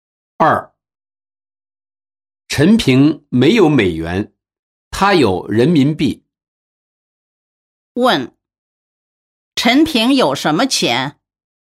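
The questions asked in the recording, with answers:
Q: 问,陈平有什么钱?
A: 人民币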